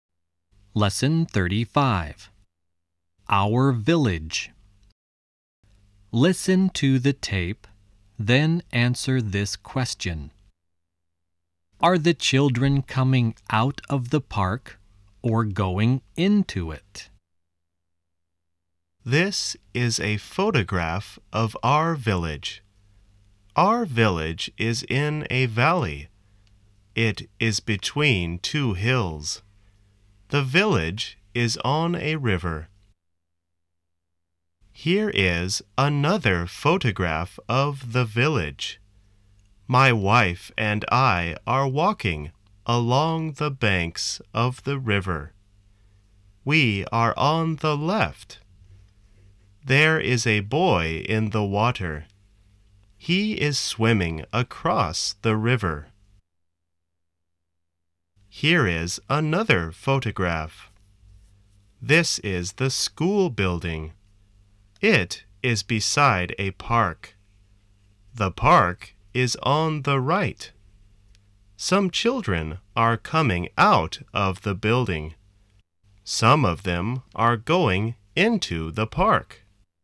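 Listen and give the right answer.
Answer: They are going into it.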